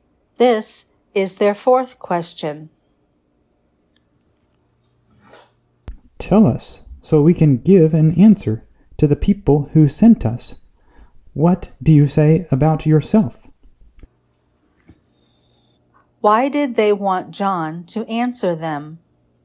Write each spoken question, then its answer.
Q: Why did they want John to answer them?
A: They wanted to give an answer to the people who sent them.